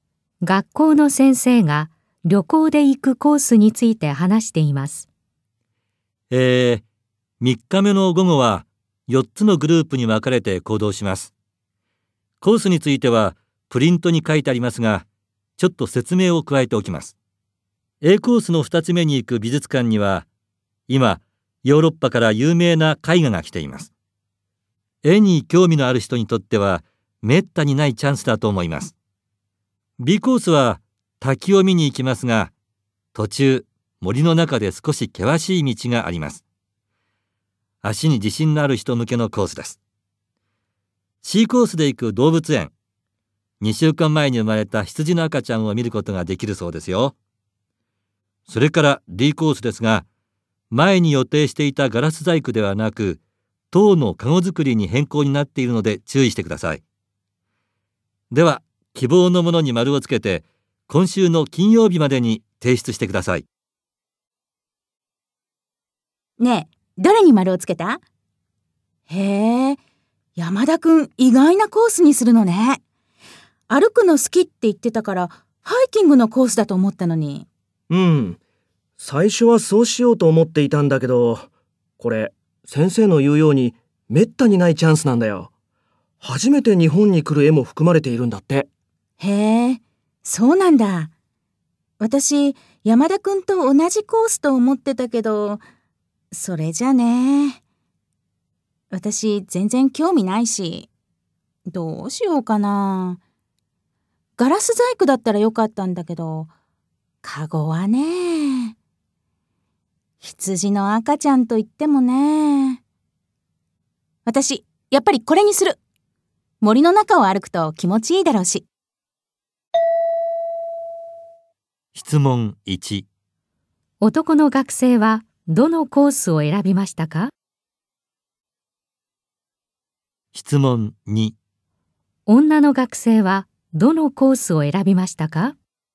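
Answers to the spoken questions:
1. Aコース
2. Bコース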